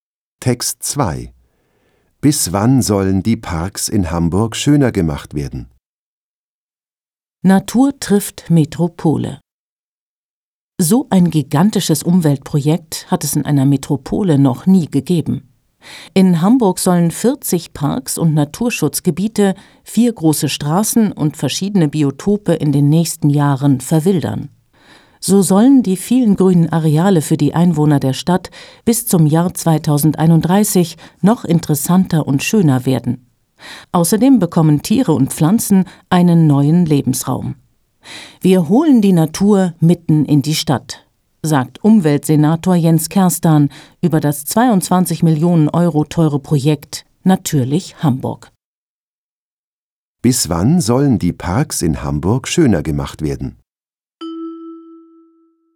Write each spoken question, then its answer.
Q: Bis wann sollen die Parks in Hamburg schöner gemacht werden?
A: Bis zum Jahr 2031.